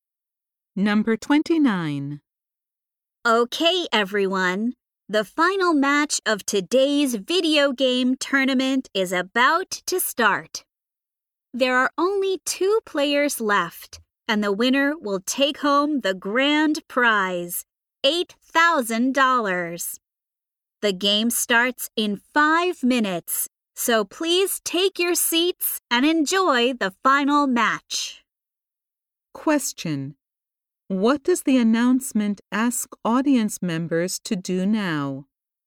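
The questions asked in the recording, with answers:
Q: what does the announcement ask audience members to do now?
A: Take their seats.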